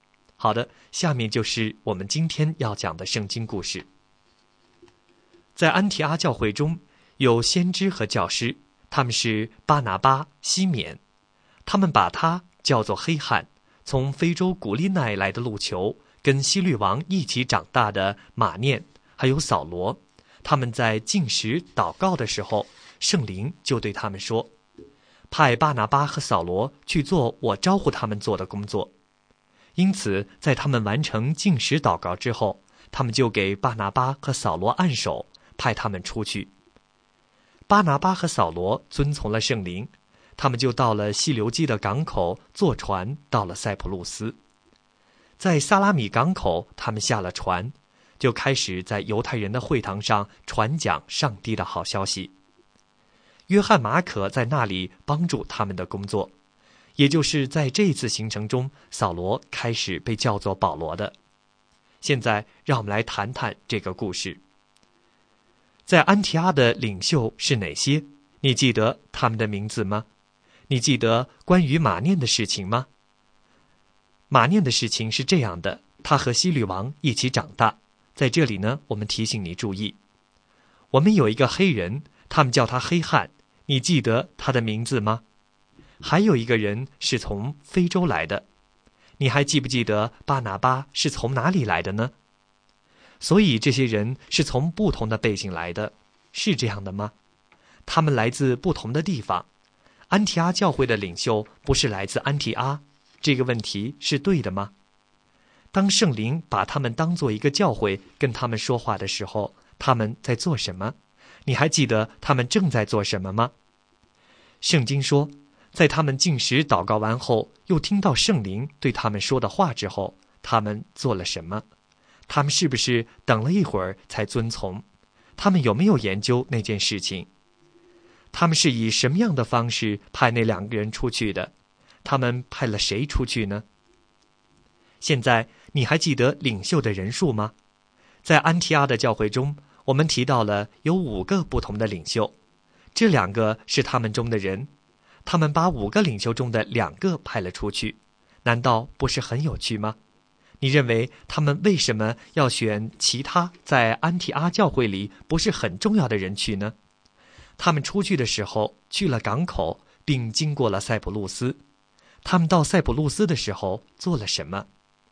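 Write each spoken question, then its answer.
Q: 当圣灵把他们当作一个教会跟他们说话的时候,他们在做什么?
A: 禁食祷告

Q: 他们派了谁出去呢?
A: 巴拿巴和扫罗

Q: 他们到塞浦路斯的时候做了什么?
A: 在犹太人的会堂上传讲上帝的好消息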